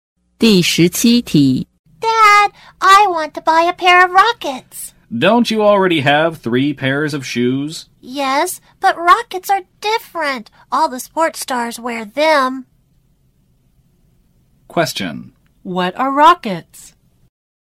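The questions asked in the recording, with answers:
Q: What are rockets?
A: A kind of shoes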